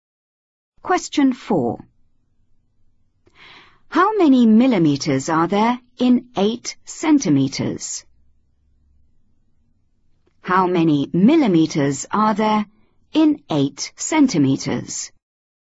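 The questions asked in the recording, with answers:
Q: How many millimeters are there in 8 centimeters?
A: 80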